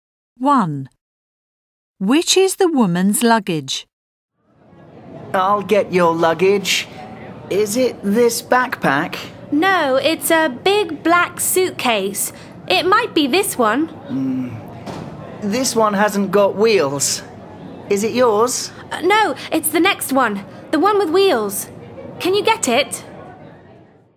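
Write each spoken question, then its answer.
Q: Which is the woman's luggage?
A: The big black suitcase with wheels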